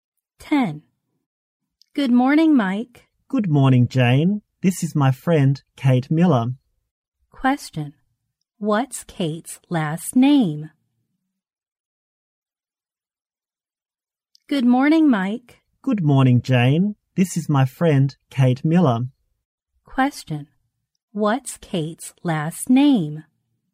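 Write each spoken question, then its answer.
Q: What's Kate's last name?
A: Miller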